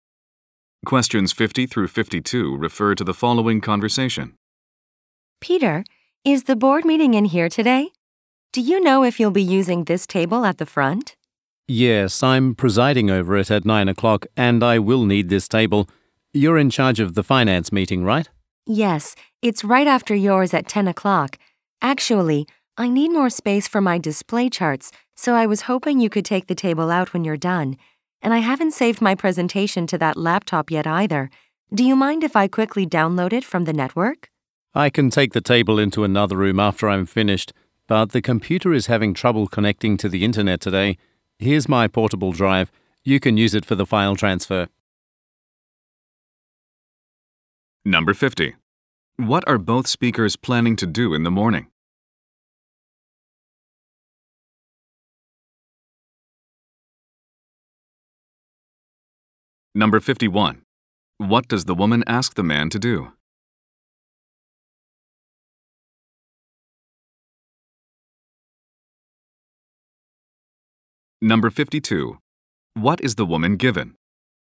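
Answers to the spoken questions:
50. Lead meetings in the room
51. Take the table out after his meeting
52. A portable drive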